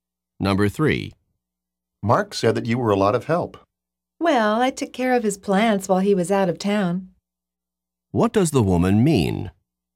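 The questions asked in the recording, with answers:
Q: What does the woman mean?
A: She took care of Mark's plants while he was away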